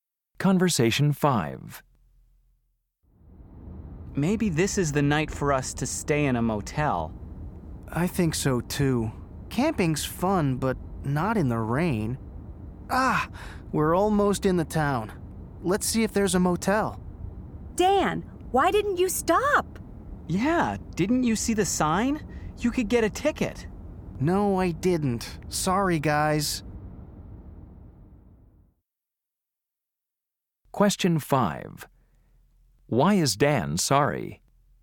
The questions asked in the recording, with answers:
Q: Why is Dan sorry?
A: You're right. I didn't even see that stop sign.